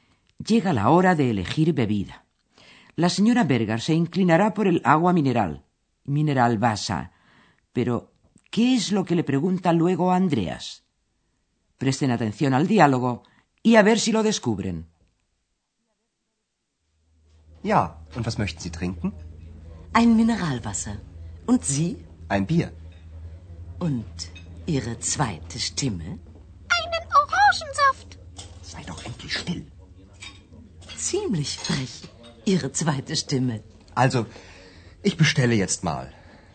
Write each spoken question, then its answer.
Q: Pero, ¿qué es lo que le pregunta luego a Andreas?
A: la señora Berger no deja escapar la oportunidad de preguntarle qué va a beber su segunda voz.